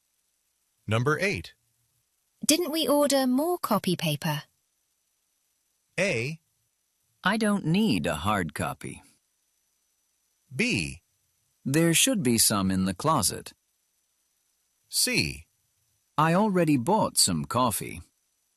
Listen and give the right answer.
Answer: 이런 식으로서 네, 주문했었다라는 것에 대한 응답을 자연스럽게 연결했었죠.